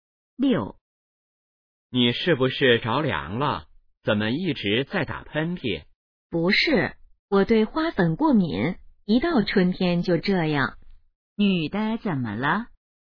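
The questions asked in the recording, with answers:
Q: 女的怎么了?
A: 对花粉过敏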